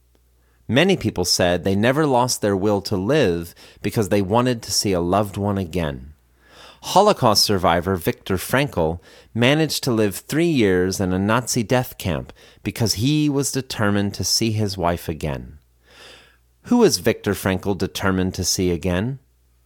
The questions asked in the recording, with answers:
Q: Who was Viktor Frankl determined to see again?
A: Viktor Frankl was determined to see his wife again.